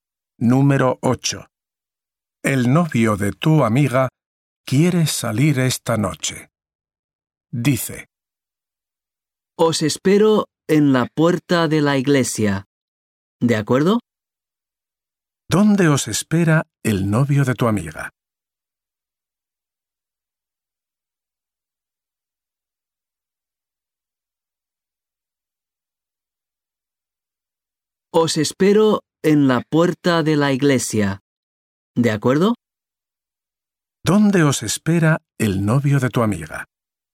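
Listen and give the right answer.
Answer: En la puerta de la iglesia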